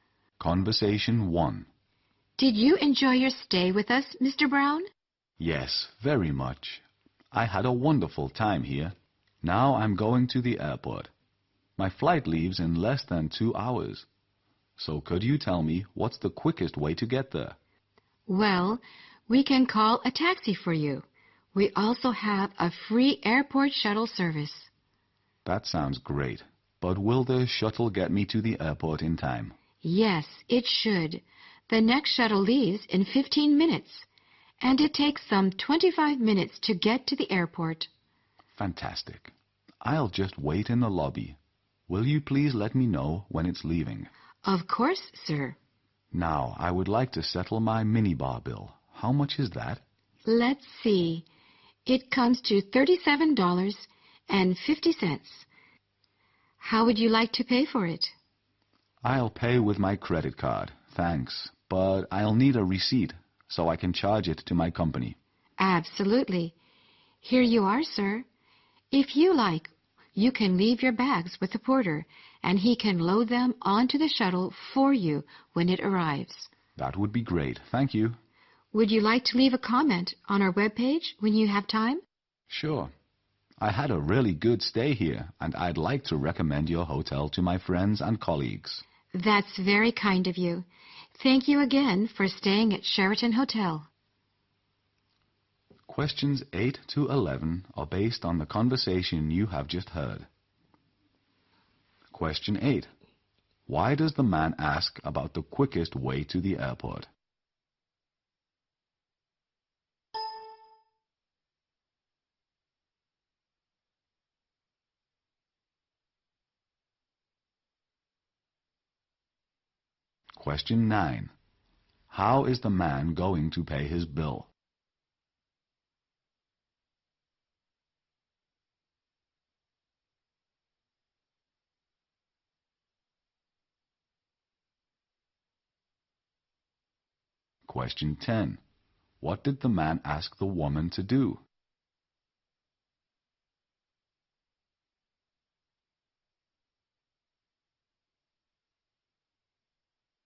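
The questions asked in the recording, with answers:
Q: Why does the man ask about the quickest way to the airport?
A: His flight leaves in less than 2 hours

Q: How is the man going to pay his bill?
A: With his credit card

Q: What did the man ask the woman to do?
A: Let him know when the shuttle is leaving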